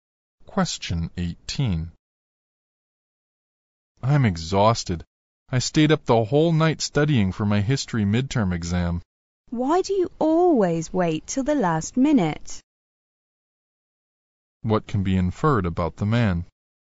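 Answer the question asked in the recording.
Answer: He always puts off studying until the last minute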